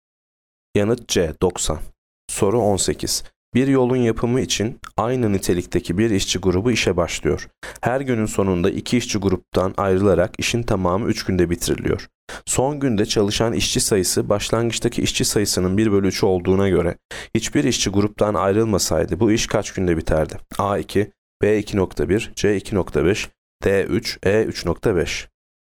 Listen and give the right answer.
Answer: Yanıt A 2.